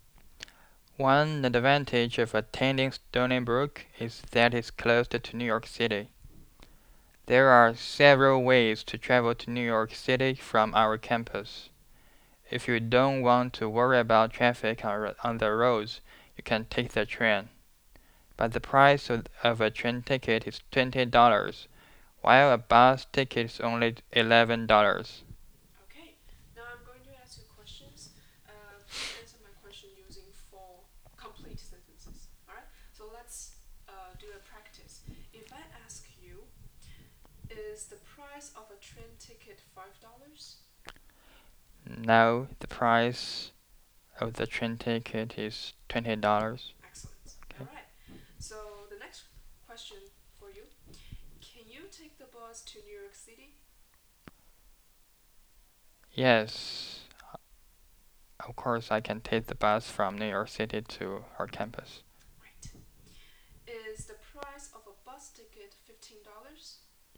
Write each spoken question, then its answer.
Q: Is the price of a bus ticket $15?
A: No, the price of the bus is only $11.